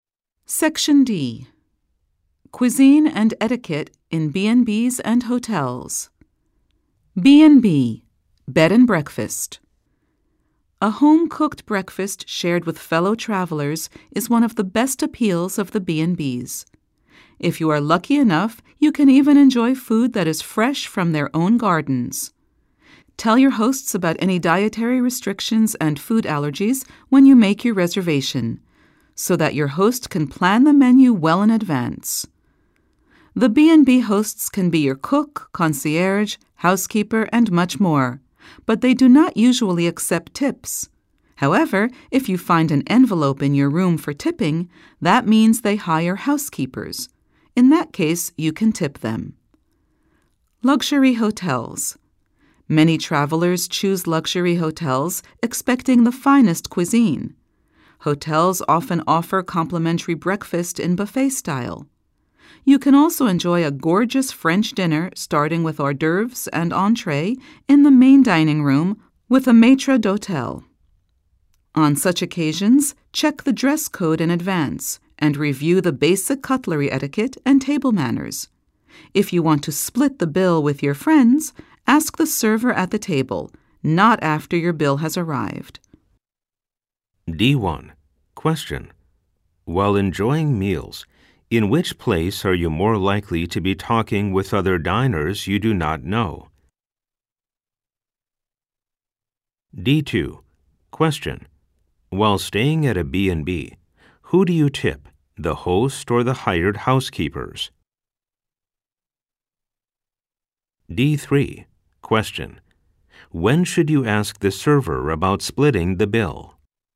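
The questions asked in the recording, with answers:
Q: While enjoying meals, in which place are you more likely to be talking with other diners you do not know?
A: At a B&B

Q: While staying at a B&B, who do you tip, the host or the hired housekeepers?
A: The hired housekeepers

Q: When should you ask the server about splitting the bill?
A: At the table, before the bill arrives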